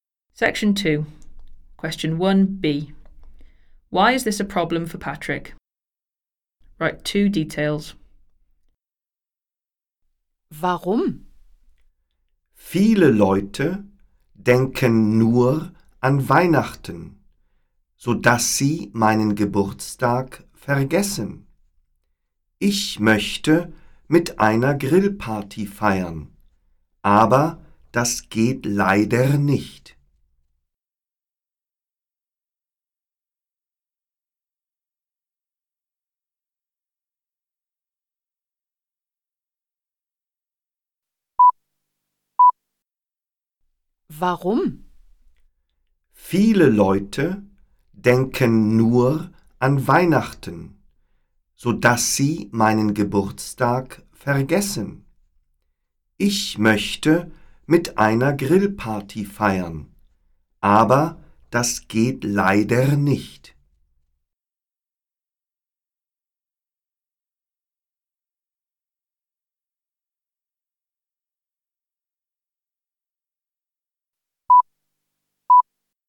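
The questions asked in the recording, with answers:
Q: Why is this a problem for Patrick?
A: People forget his birthday because they think only of Christmas; he can't have a barbecue party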